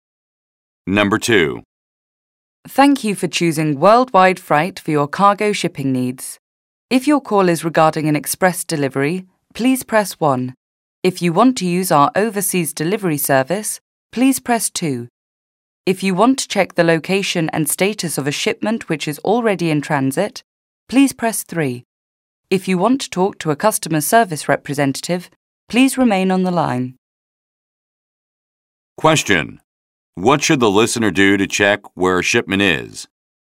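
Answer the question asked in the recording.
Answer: Press 3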